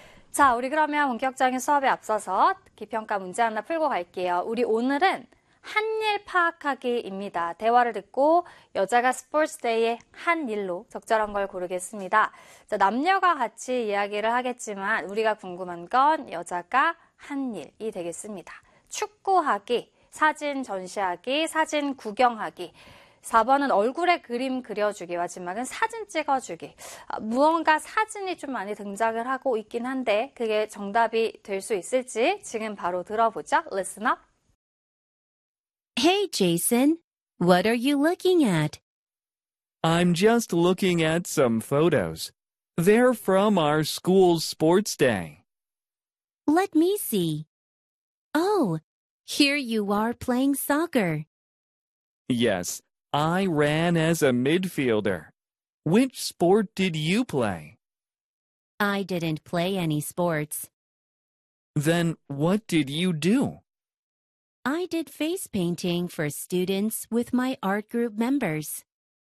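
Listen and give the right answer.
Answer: 4: 얼굴에 그림 그려주기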